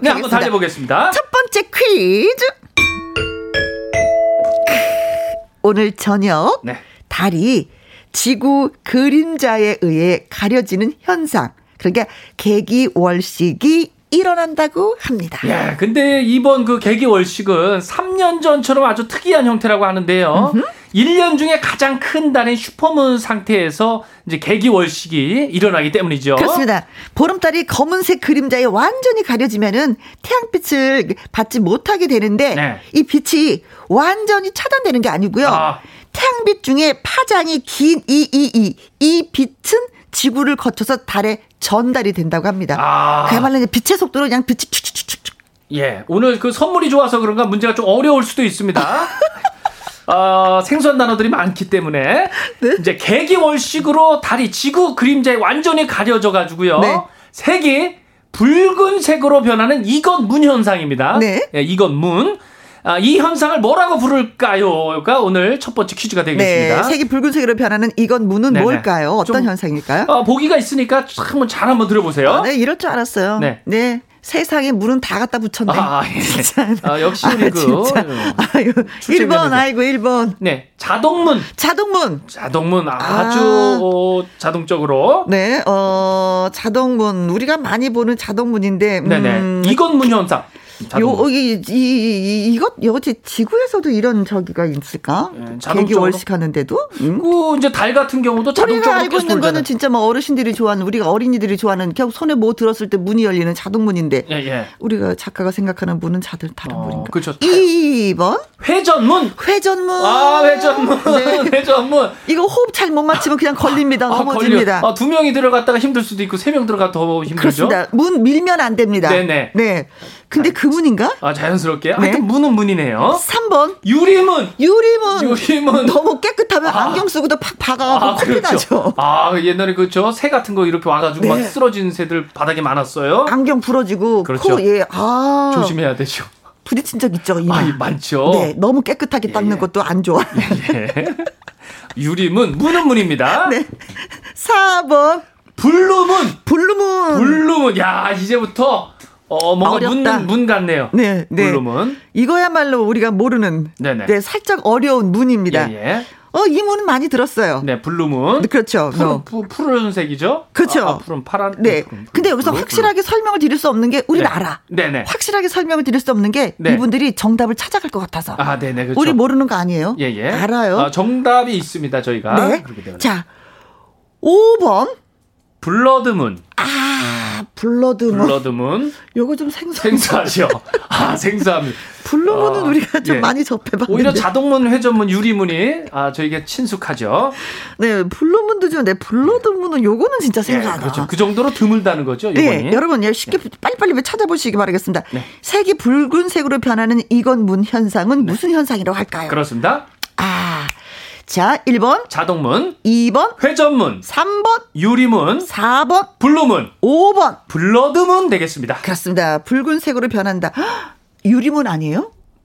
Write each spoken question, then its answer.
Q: 이 현상을 뭐라고 부를까요?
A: 네, 5번 블러드문이 정답 되겠습니다.